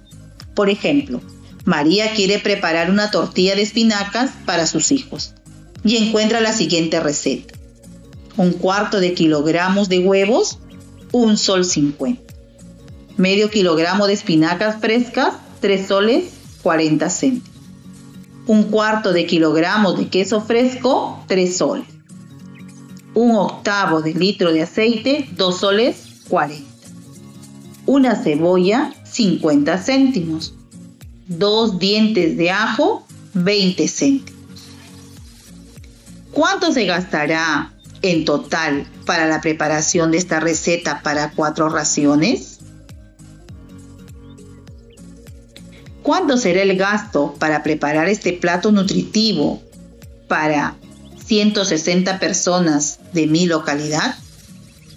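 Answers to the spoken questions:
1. 11 soles
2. 440 soles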